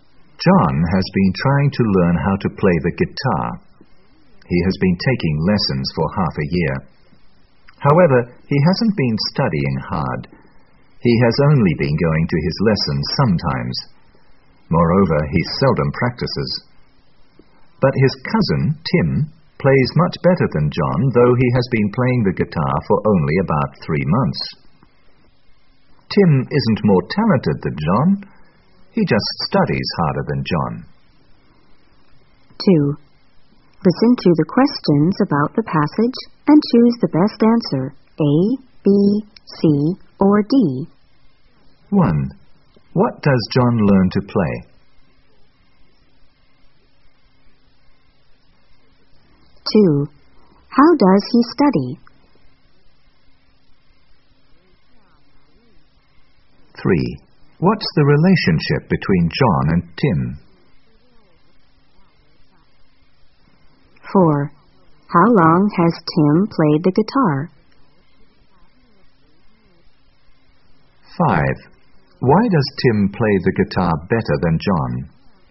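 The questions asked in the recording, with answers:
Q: What does John learn to play?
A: The guitar

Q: How does he study?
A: He doesn't study hard; he seldom goes to lessons or practices

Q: What's the relationship between John and Tim?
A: They are cousins

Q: How long has Tim played the guitar?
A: About 3 months

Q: Why does Tim play the guitar better than John?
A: He studies harder than John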